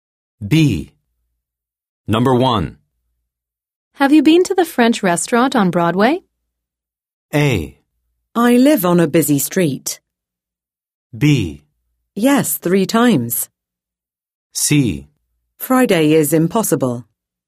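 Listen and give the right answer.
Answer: B: Yes, 3 times.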